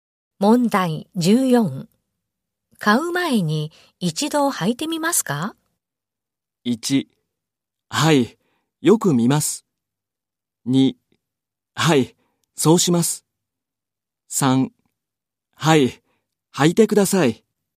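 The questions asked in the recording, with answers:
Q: 買う前に一度履いてみますか?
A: 3: はい、そうします。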